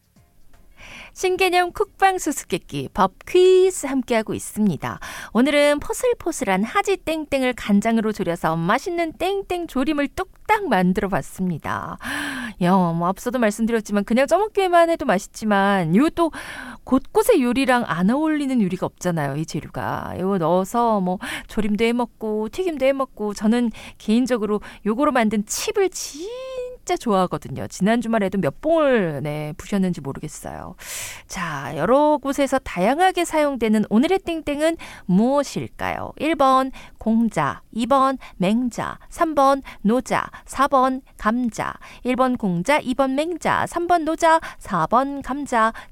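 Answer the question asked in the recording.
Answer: 4번: 감자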